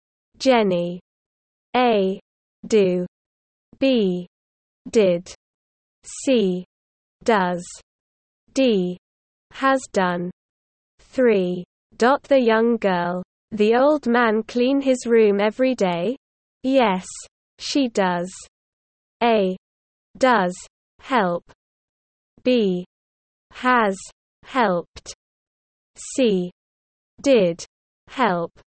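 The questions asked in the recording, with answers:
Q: Dot the young girl. The old man clean his room every day? Yes, she does.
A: A: Does. Help.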